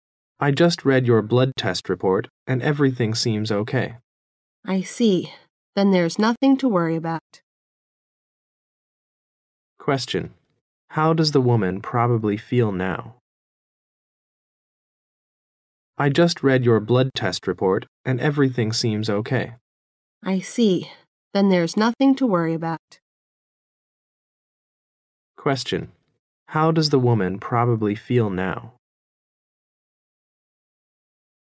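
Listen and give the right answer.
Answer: Relieved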